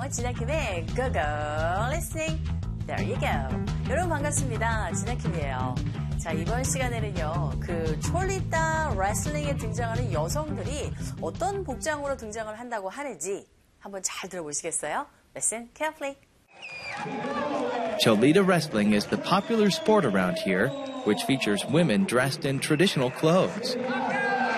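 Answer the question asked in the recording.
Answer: 전통 의상 (traditional clothes)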